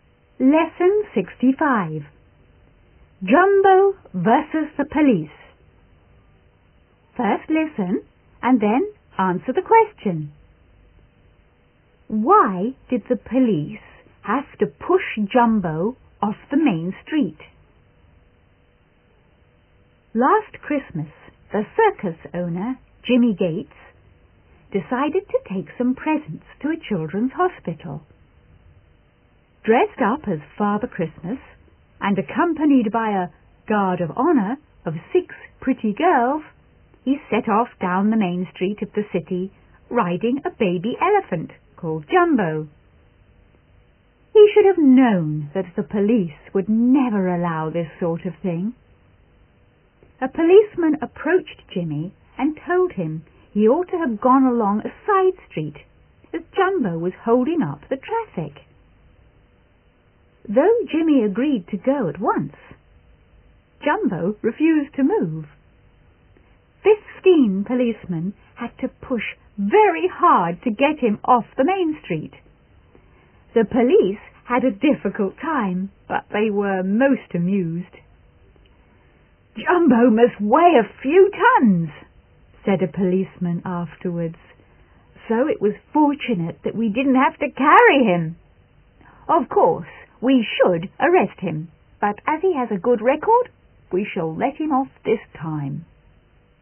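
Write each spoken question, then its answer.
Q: Why did the police have to push Jumbo off the main street?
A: Because Jumbo was holding up the traffic and refused to move.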